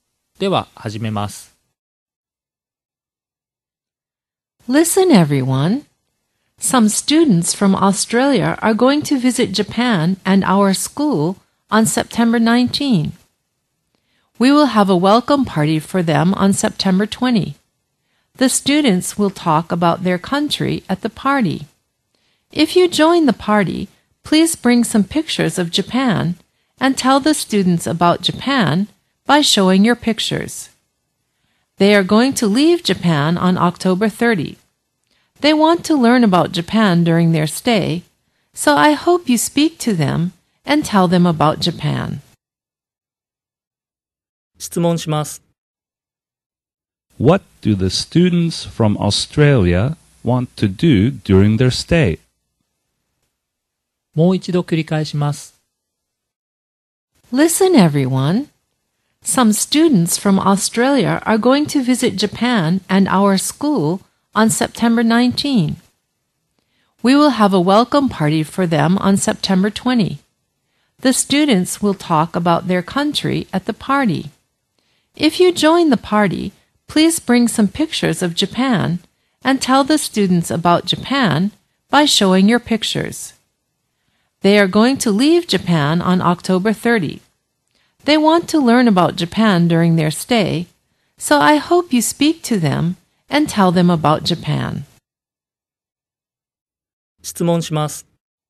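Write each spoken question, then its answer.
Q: What do the students from Australia want to do during their stay?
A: They want to learn about Japan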